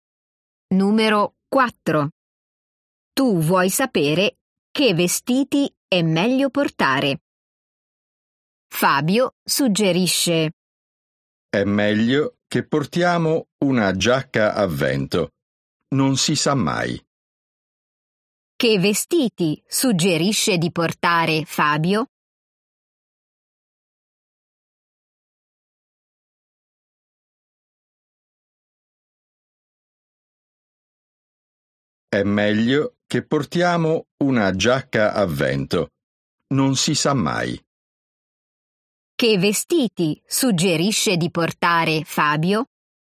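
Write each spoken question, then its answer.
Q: Che vestiti suggerisce di portare Fabio?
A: Una giacca a vento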